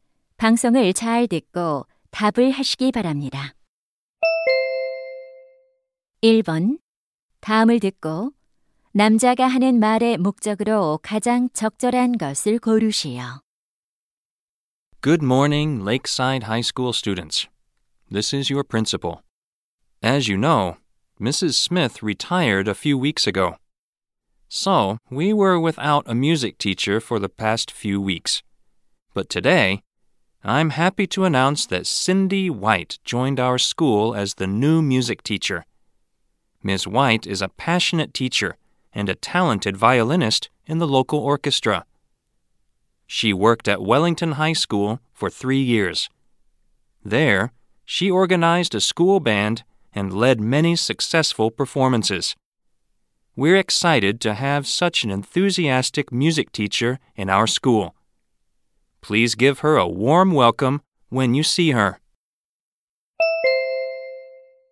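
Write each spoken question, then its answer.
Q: 다음을 듣고 남자가 하는 말의 목적으로 가장 적절한 것을 고르시오.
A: 새 음악 교사를 소개하려고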